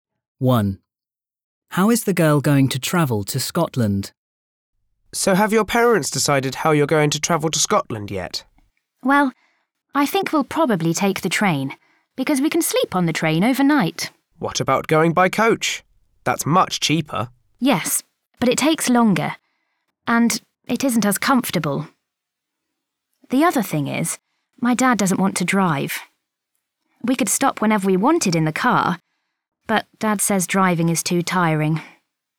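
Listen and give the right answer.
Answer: By train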